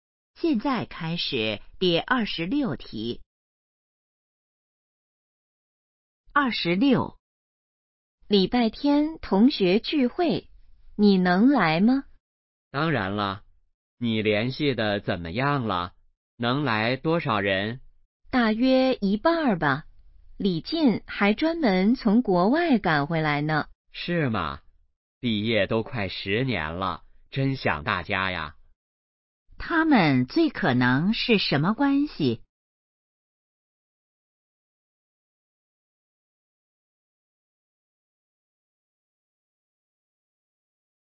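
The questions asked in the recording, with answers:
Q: 他们最可能是什么关系?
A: 同学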